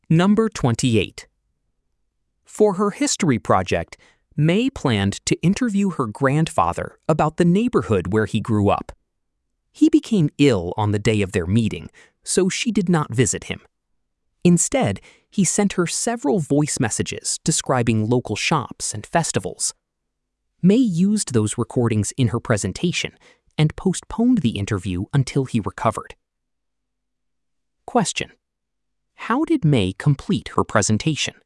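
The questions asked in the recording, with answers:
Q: how did May complete her presentation?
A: By using voice messages her grandfather sent her about local shops and festivals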